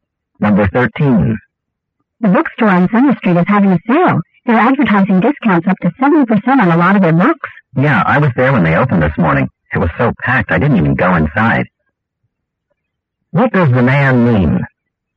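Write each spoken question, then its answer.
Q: What does the man mean?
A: The store was too crowded, so he didn't go in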